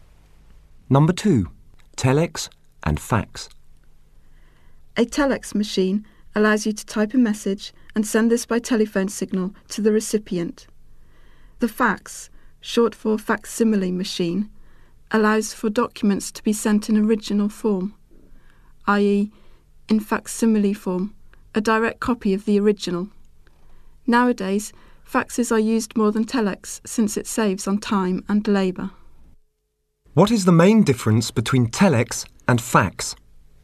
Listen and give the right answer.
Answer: With telex, messages must be typed.